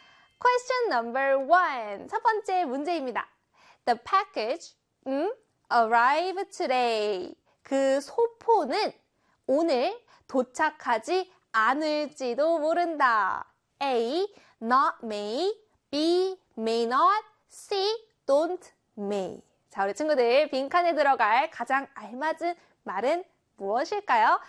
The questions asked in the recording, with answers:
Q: 자, 우리 친구들, 빈칸에 들어갈 가장 알맞은 말은 무엇일까요?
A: 바로 B의 may not이 와야겠죠